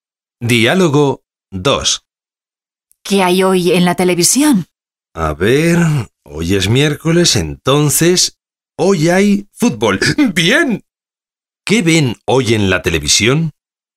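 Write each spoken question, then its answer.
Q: ¿Qué ven hoy en la televisión?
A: Fútbol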